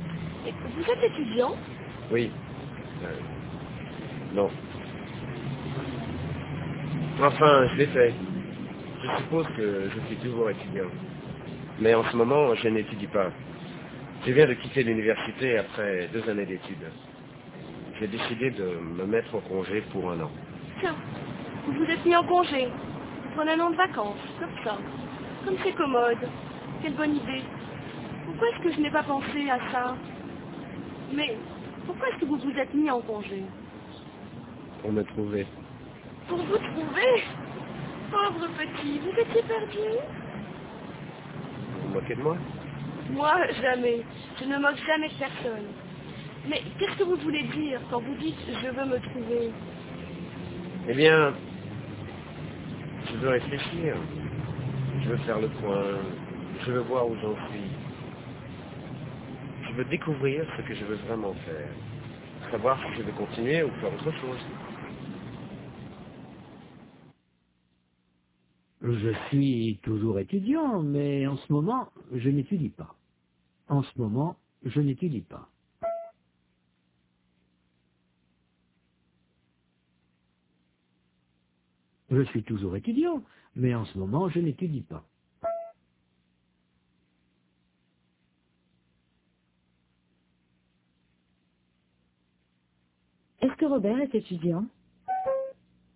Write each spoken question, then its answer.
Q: Est-ce que Robert est étudiant?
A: Oui, mais en ce moment, il n'étudie pas.